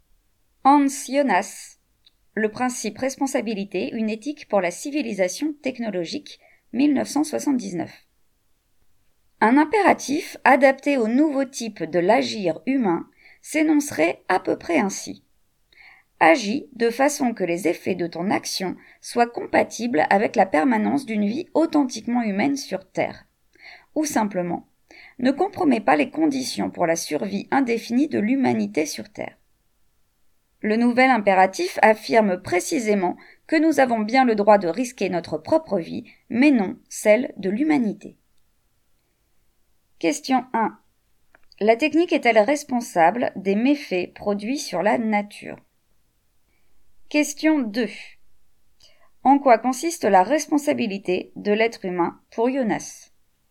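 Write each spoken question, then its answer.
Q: En quoi consiste la responsabilité de l'être humain pour Jonas?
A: Agir de façon que les effets de son action soient compatibles avec la permanence d'une vie authentiquement humaine sur Terre, sans compromettre la survie de l'humanité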